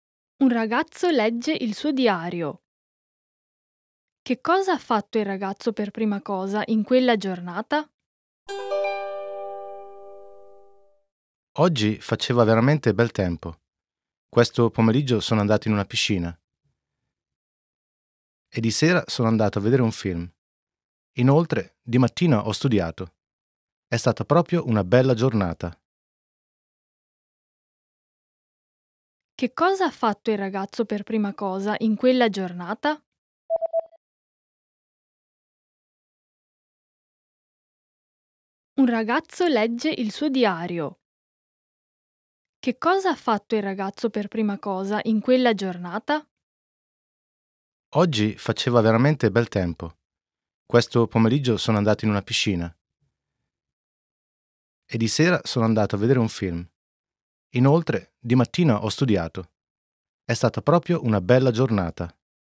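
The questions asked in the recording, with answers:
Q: Che cosa ha fatto il ragazzo per prima cosa in quella giornata?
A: Ha studiato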